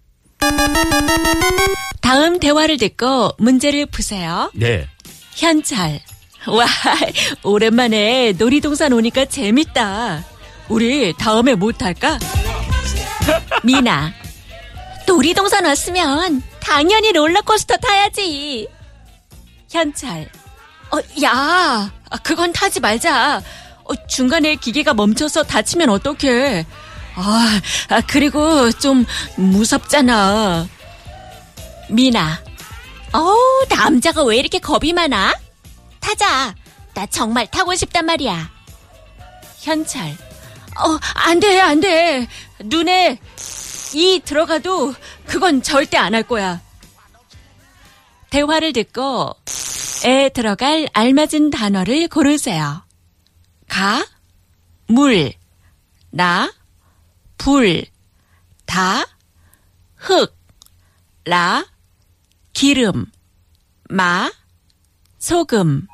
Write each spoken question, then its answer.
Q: 대화를 듣고 에 들어갈 알맞은 단어를 고르세요.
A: 다, hook, soil. Yes, Bajaj got it right. The answer is 다.